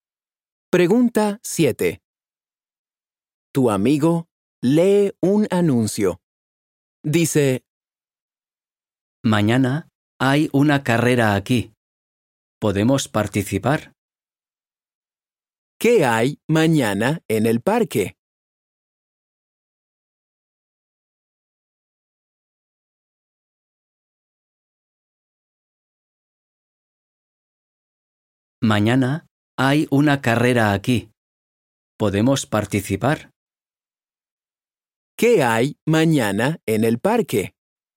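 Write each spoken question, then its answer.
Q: ¿Qué hay mañana en el parque?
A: Una carrera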